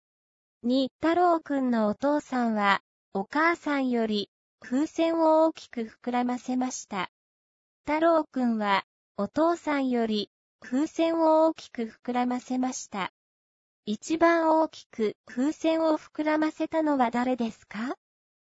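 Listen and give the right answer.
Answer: 太郎くん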